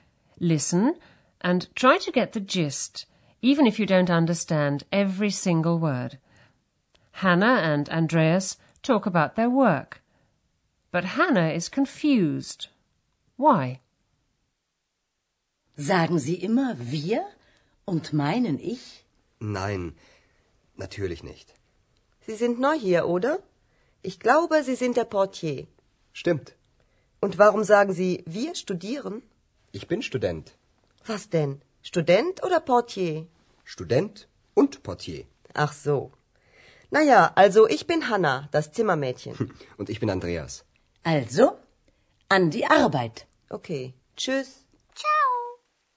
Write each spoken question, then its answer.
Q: Hannah and Andreas talk about their work, but Hannah is confused. Why?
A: Hannah is confused because Andreas says he's a student, although he's just told her that he's the hotel porter.